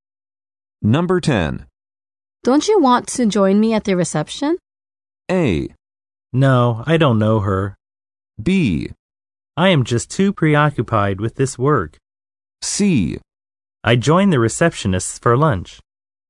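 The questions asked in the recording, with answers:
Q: Don't you want to join me at the reception?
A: B: I am just too preoccupied with this work.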